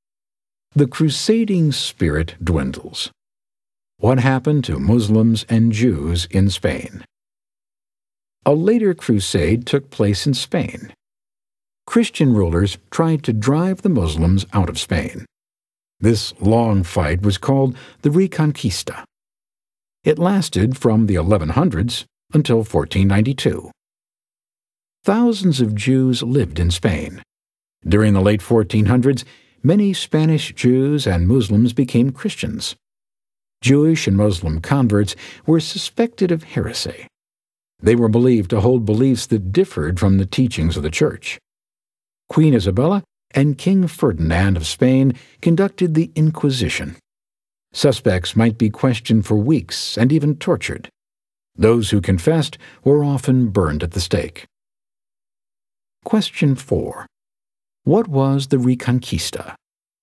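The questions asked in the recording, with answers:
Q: What was the Reconquista?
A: The long fight by Christian rulers to drive the Muslims out of Spain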